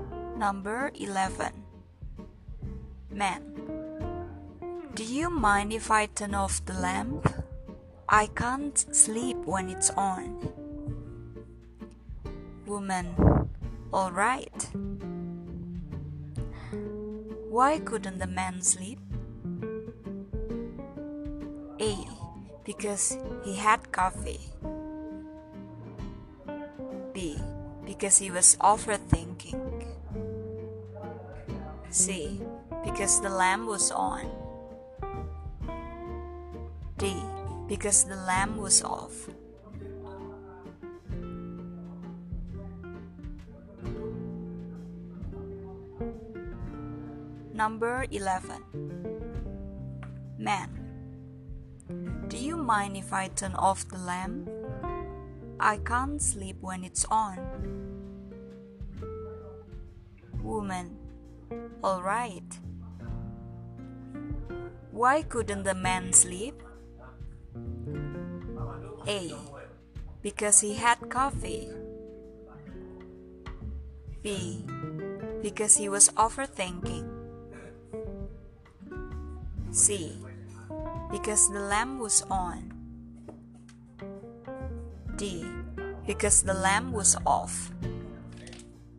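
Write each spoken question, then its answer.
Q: Why couldn't the man sleep?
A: C: Because the lamp was on.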